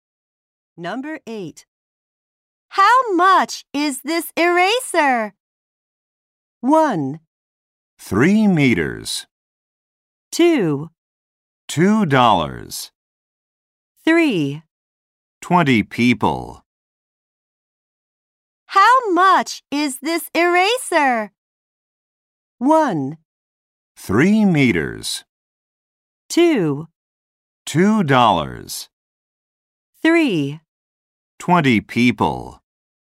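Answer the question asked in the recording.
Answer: 2: $2.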